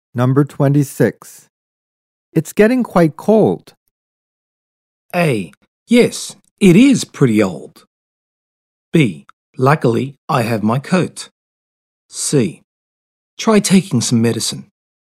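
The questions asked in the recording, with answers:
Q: It's getting quite cold.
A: B: Luckily, I have my coat.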